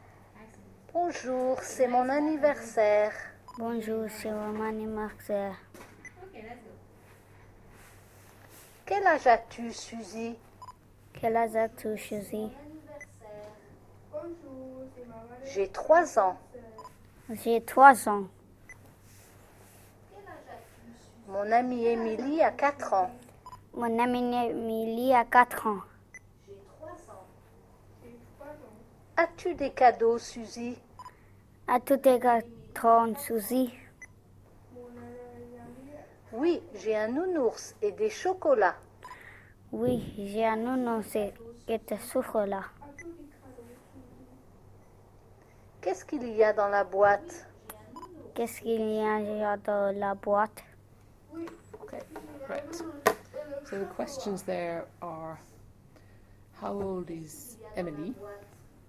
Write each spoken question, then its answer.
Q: how old is Emily?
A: Quatre